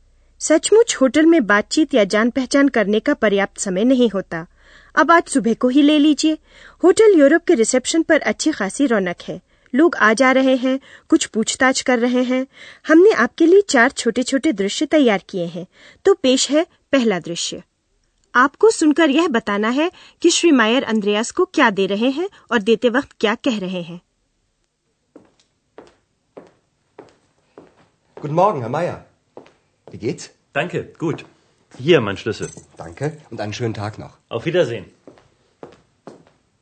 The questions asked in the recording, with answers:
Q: आपको सुनकर यह बताना है कि श्री मायर अंद्रयास को क्या दे रहे हैं और देते वक्त क्या कह रहे हैं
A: श्री मायर अपनी चाबी मेज पर रखते हुए कहते हैं ये रही मेरी चाबी